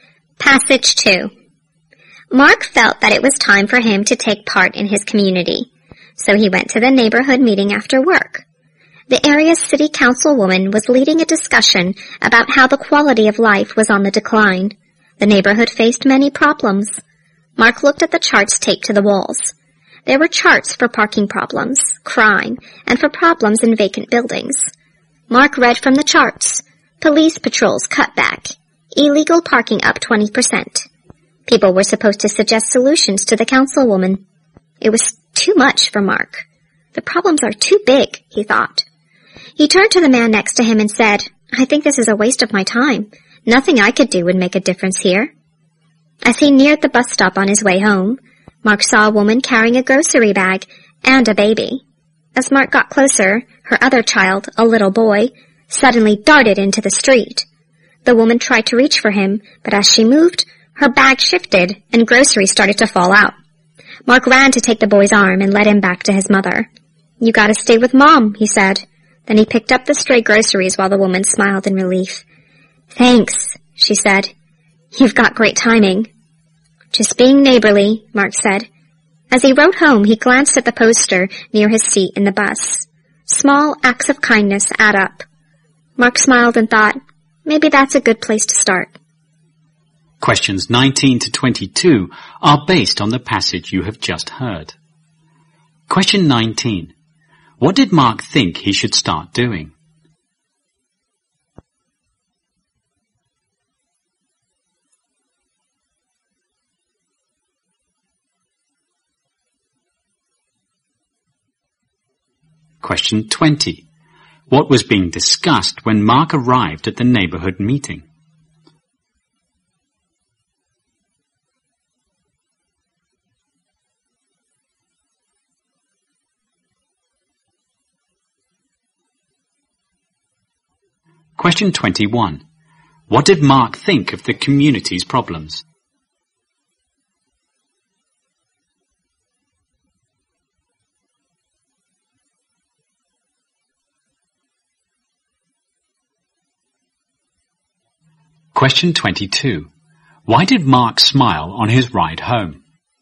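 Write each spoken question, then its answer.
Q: What did Mark think he should start doing?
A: Taking part in his community

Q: What was being discussed when Mark arrived at the neighborhood meeting?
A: How the neighborhood's quality of life was declining

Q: What did Mark think of the community's problems?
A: They were too big for him to make any difference

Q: Why did Mark smile on his ride home?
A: He realized that small acts of kindness add up and were a good place to start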